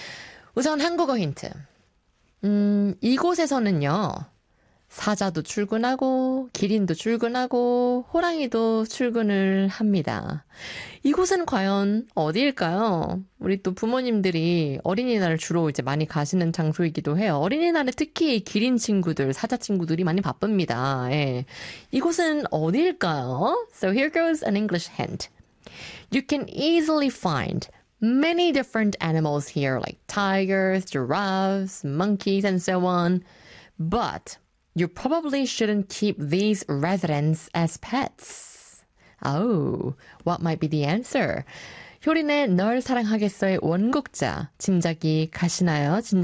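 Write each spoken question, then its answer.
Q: 이곳은 과연 어디일까요?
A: 동물원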